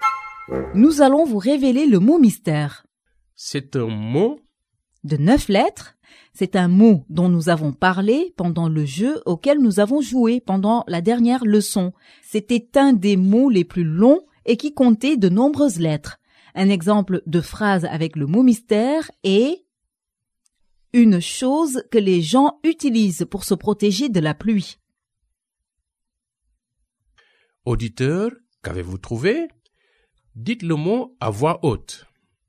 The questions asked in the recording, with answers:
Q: Auditeur, qu'avez-vous trouvé?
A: Le mot mystère d'aujourd'hui est parapluie.